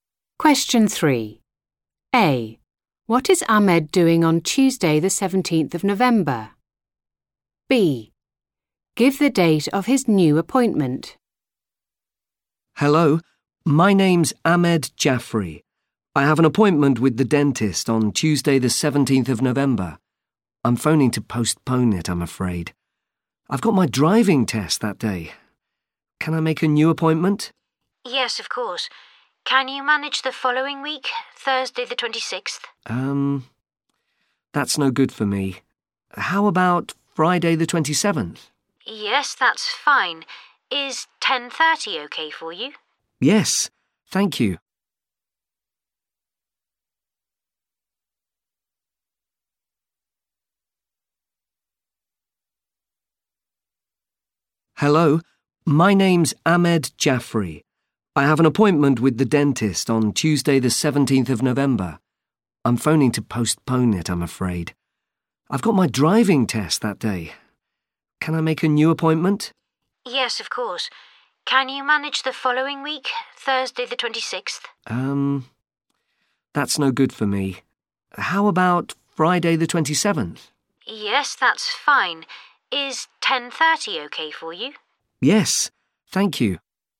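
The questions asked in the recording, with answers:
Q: What is Ahmed doing on Tuesday, the 17th of November?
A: Taking his driving test

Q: Give the date of his new appointment.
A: Friday 27th November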